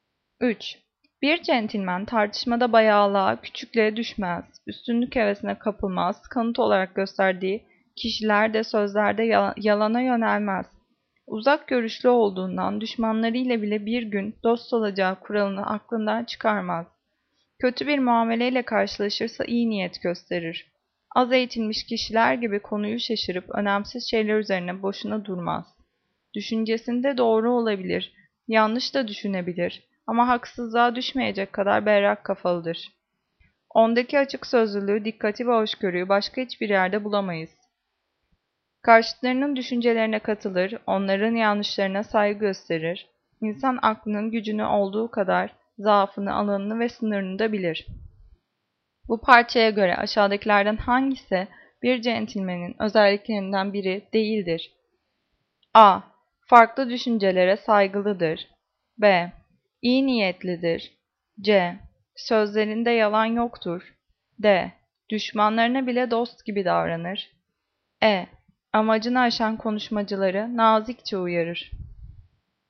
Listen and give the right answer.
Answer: Cevap E. Amacını aşan konuşmacıları nazikçe uyarır.